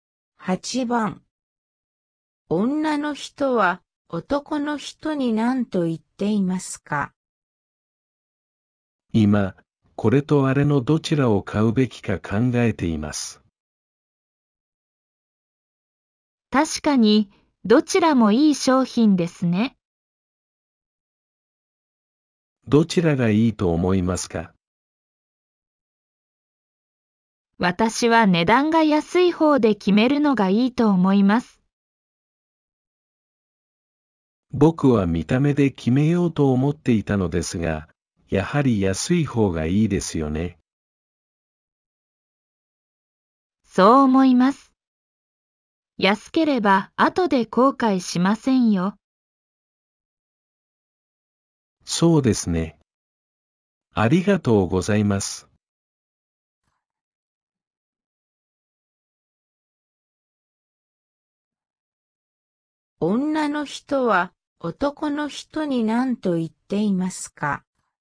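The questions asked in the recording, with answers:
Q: 女の人は男の人に何と言っていますか?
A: 値段が安い方を買うのがいい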